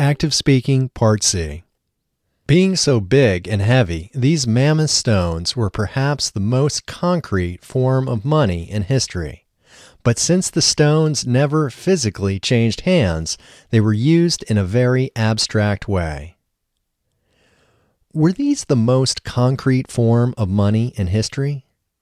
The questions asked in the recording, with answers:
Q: Were these the most concrete form of money in history?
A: Yes, these were perhaps the most concrete form of money in history.